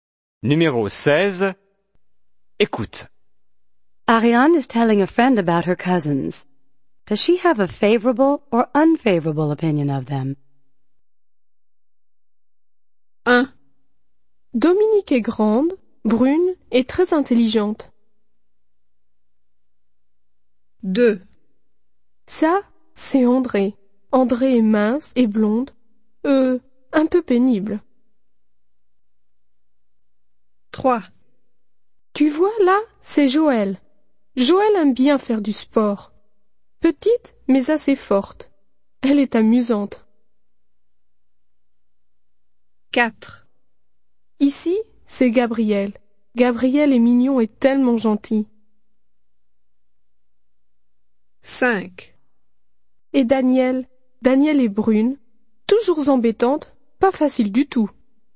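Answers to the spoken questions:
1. favorable
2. unfavorable
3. favorable
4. favorable
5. unfavorable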